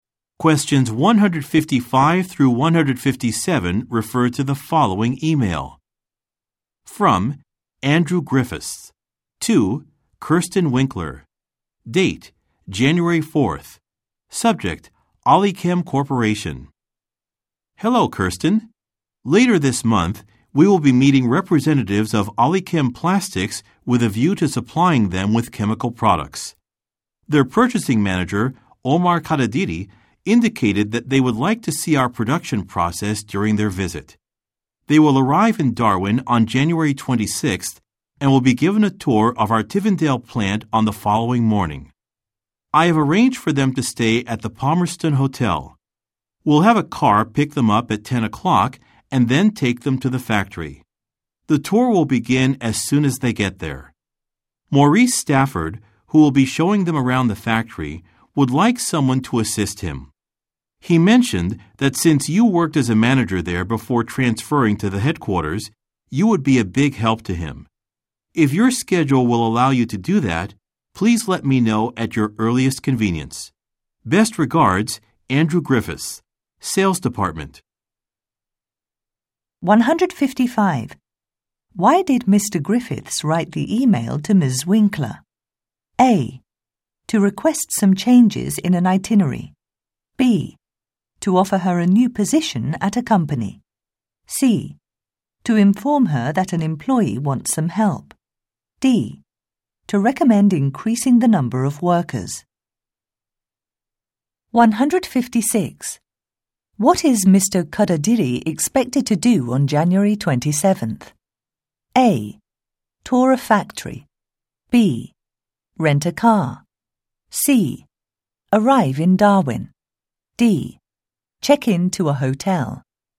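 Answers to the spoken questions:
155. C: To inform her that an employee wants some help.
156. A: Tour a factory.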